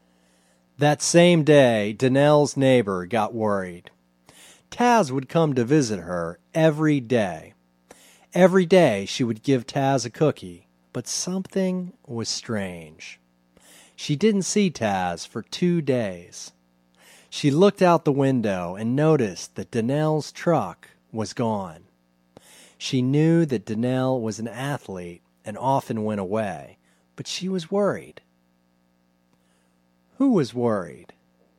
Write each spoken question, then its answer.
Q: Who was worried?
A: Danelle's neighbor was worried.